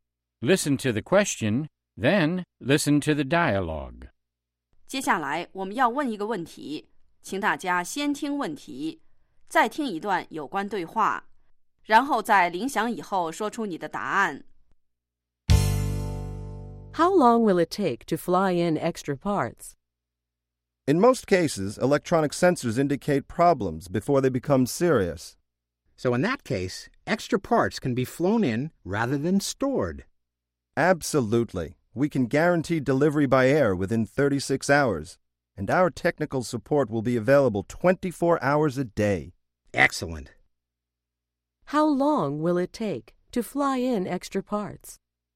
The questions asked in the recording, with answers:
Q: How long will it take to fly in extra parts?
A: It will take 36 hours or less.